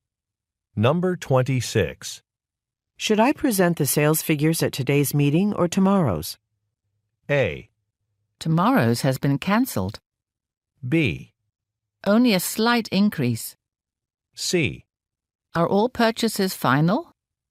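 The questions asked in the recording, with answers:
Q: Should I present the sales figures at today's meeting or tomorrow's?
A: A: Tomorrow's has been cancelled.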